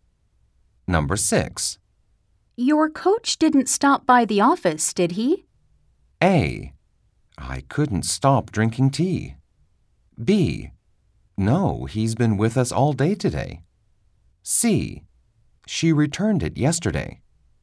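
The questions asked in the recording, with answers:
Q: Your coach didn't stop by the office, did he?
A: B: No, he's been with us all day today.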